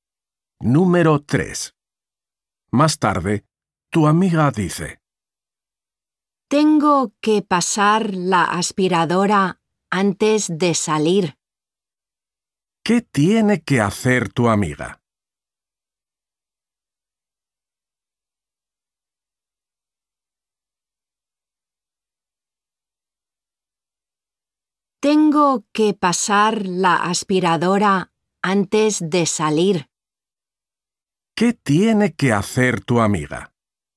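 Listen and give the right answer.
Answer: pasar la aspiradora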